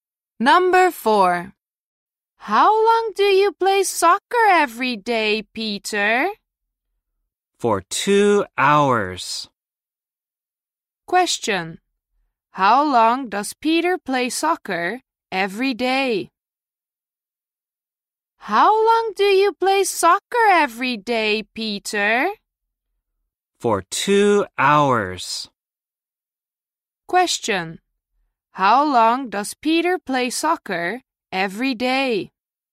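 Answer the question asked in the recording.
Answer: For 2 hours.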